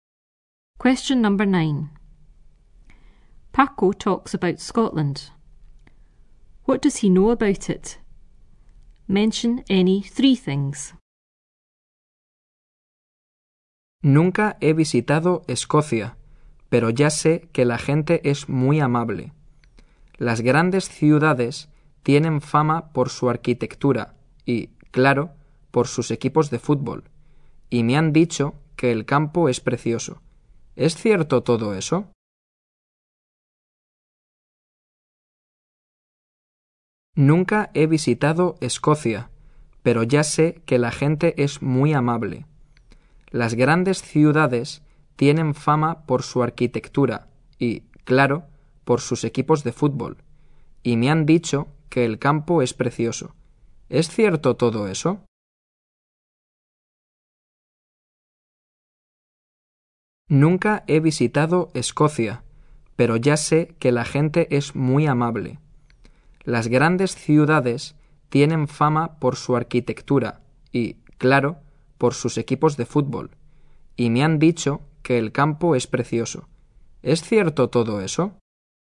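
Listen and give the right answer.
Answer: People are very friendly; cities famous for architecture and football teams; countryside is beautiful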